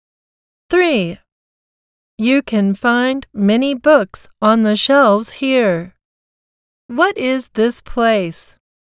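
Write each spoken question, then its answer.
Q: What is this place?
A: a library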